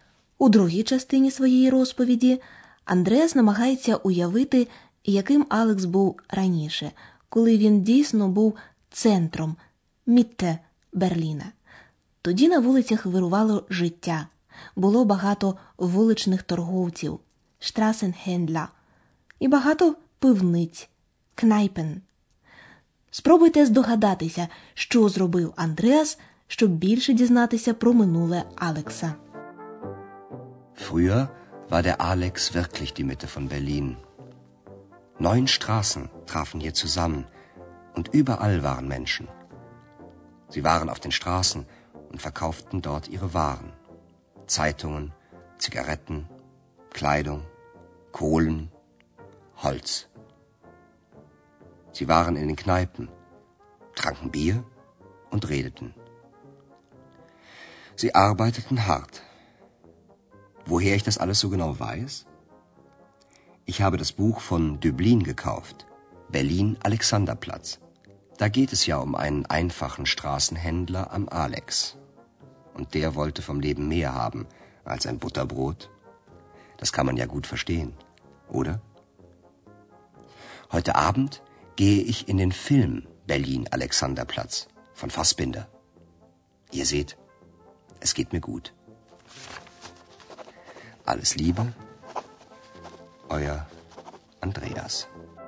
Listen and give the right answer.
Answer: Отже, щоб більше дізнатися про минуле Александерплац, Андреас купив відому книжку письменника Дебліна «Берлін Александерплац».